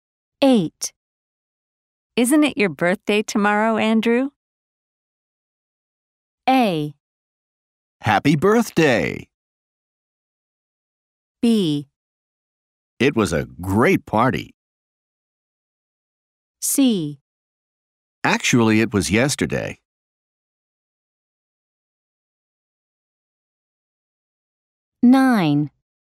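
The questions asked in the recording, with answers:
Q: Isn't it your birthday tomorrow, Andrew?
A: C: Actually, it was yesterday.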